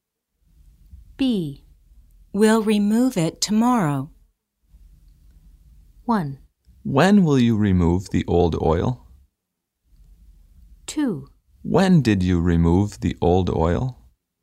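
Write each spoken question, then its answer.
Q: We'll remove it tomorrow.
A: 1: When will you remove the old oil?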